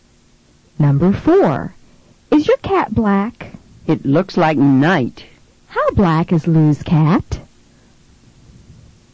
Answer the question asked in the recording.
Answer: It's as black as night.